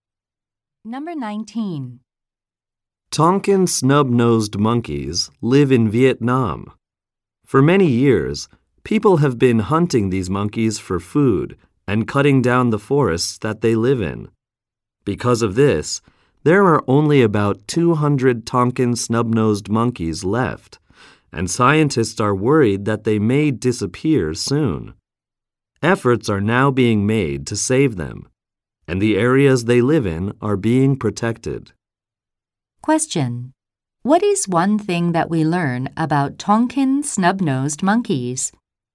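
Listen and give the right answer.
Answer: Only about 200 are left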